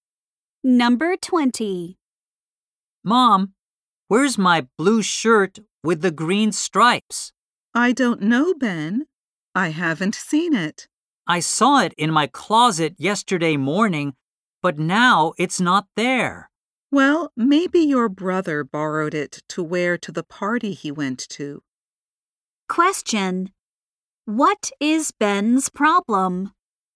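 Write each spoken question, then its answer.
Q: What is Ben's problem?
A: He can't find his blue shirt.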